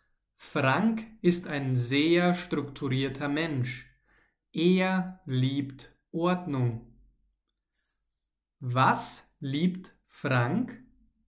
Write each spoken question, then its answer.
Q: Was liebt Frank?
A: Ordnung. Er, also Frank, liebt Ordnung.